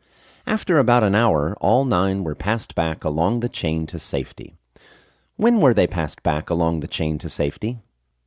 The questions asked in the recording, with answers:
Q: When were they passed back along the chain to safety?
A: After about an hour, they were passed back along the chain to safety.